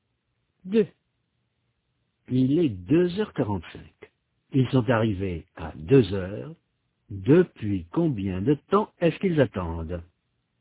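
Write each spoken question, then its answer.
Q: Depuis combien de temps est-ce qu'ils attendent?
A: Trois quarts d'heure (45 minutes)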